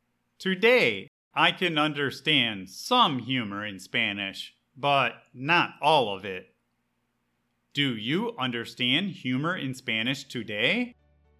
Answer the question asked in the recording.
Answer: Sometimes I can understand a joke in Spanish, but not always.